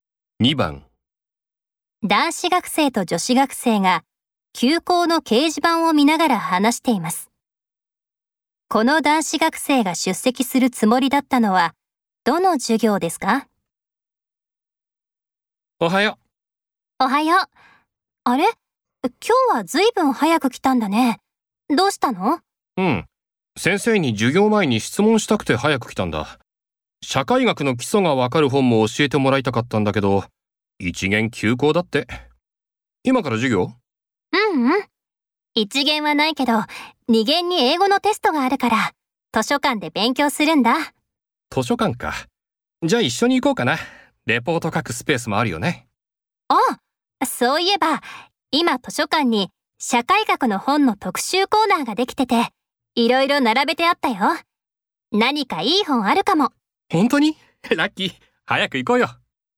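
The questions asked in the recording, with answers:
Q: この男子学生が出席するつもりだったのはどの授業ですか?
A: 1限の社会学の授業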